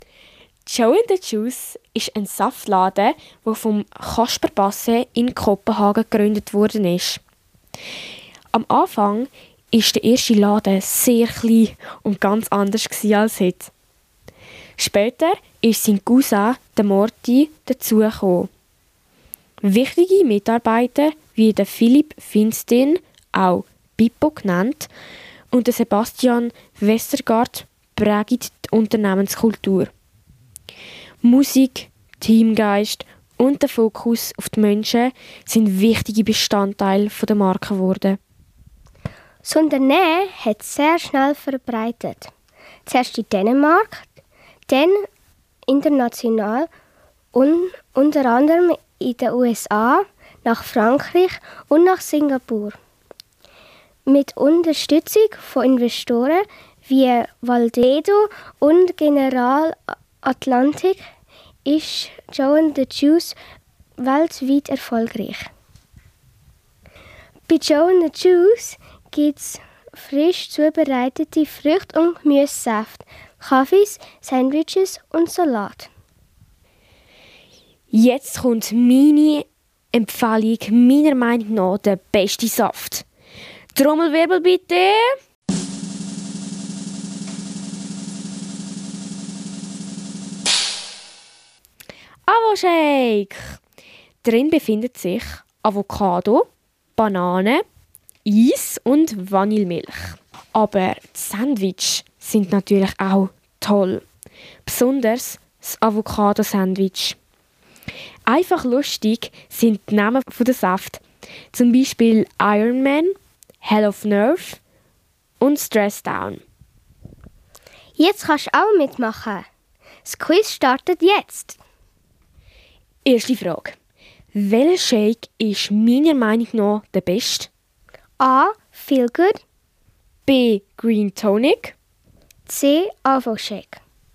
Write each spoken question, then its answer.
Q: Welcher Shake ist meiner Meinung nach der beste?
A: Es ist der Avo Shake.